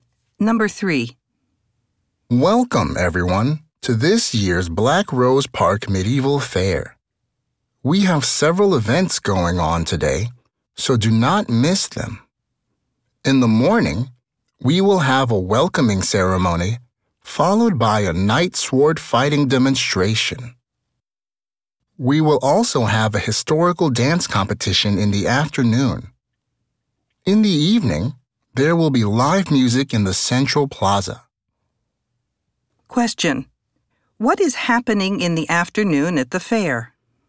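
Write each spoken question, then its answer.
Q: What is happening in the afternoon at the fair?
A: A historical dance competition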